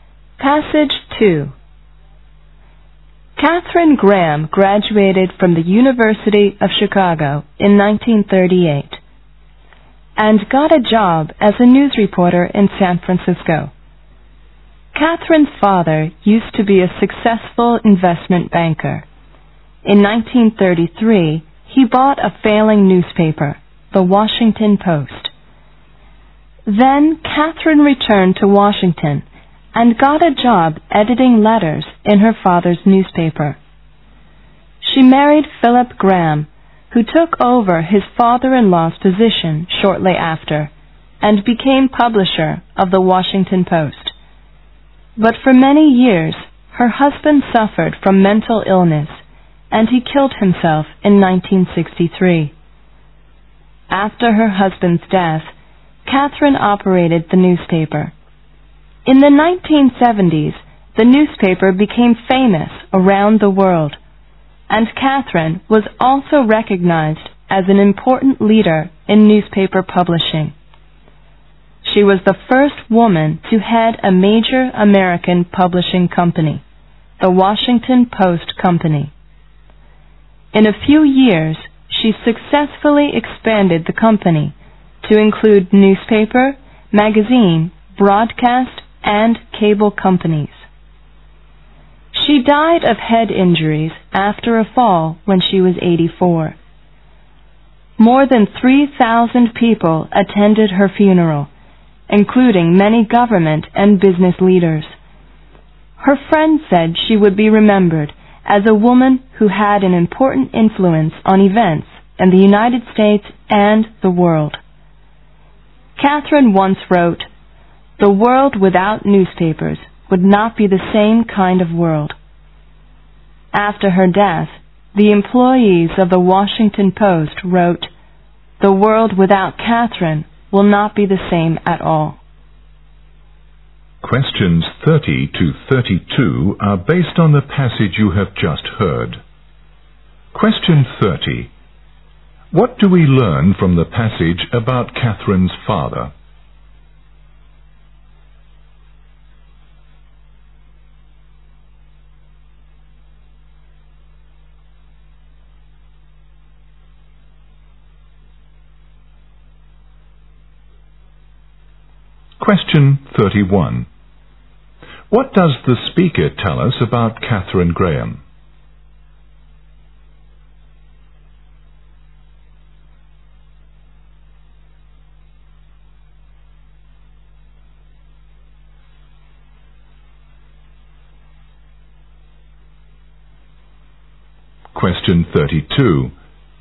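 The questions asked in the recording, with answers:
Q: What do we learn from the passage about Catherine's father?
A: He was a successful investment banker who bought the failing Washington Post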